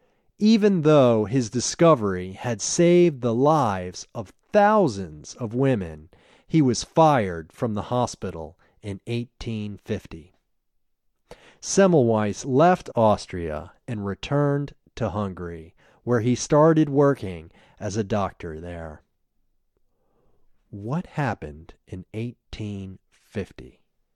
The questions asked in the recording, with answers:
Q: What happened in 1850?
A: In 1850, he was fired.